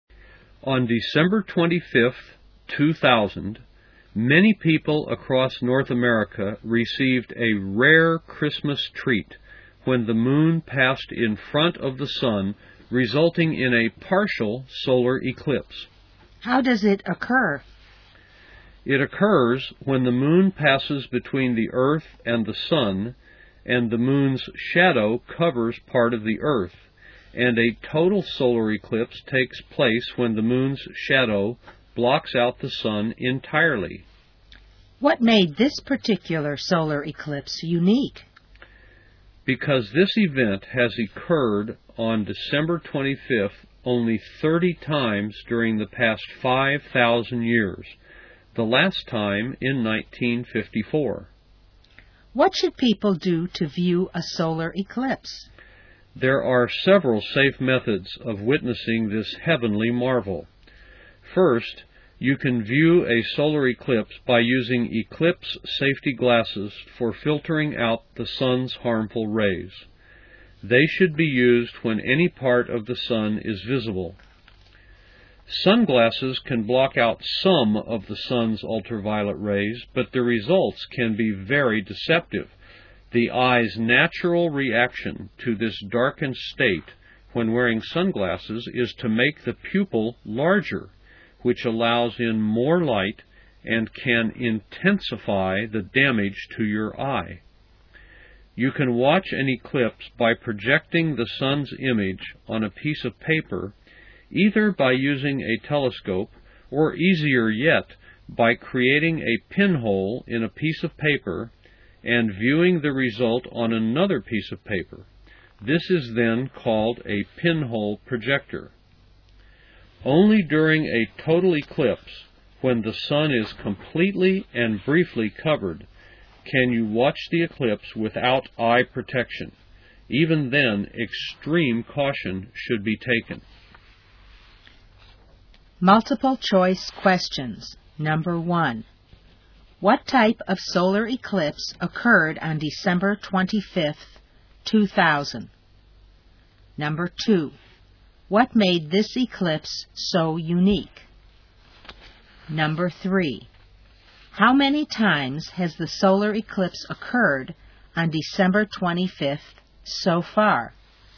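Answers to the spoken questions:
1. A partial solar eclipse
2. It happened on December 25th, which has occurred only 30 times in the past 5,000 years
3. 30 times in the past 5,000 years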